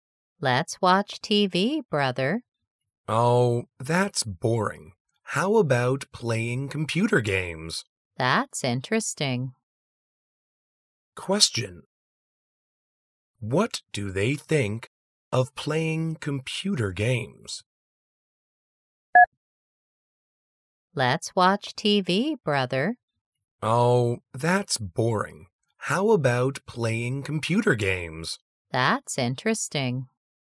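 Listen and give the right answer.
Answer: Interesting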